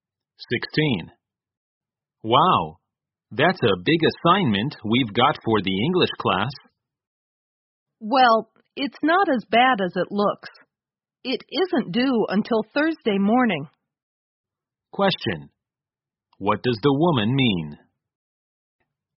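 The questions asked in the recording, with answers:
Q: What does the woman mean?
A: The assignment isn't so bad; there's time because it's not due until Thursday morning.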